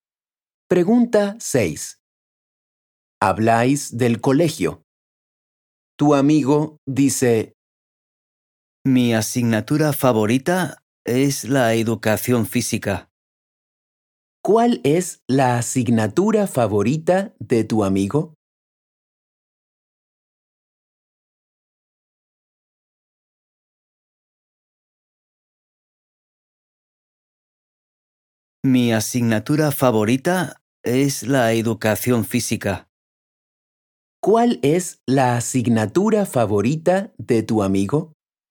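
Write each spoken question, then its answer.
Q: ¿Cuál es la asignatura favorita de tu amigo?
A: la educación física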